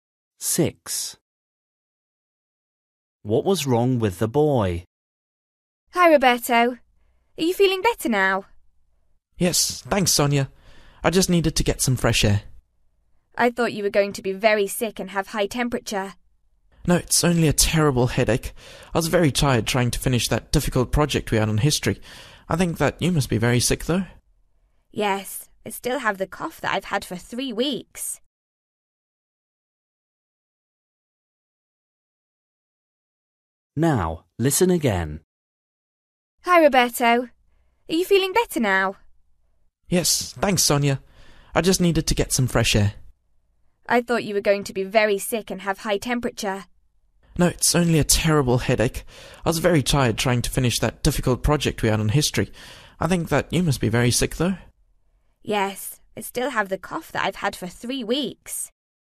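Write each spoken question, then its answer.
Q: What was wrong with the boy?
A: a terrible headache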